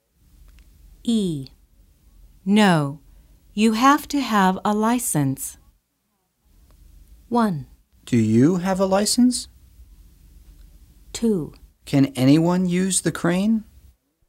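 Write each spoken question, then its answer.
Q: No, you have to have a license.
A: 2: Can anyone use the crane?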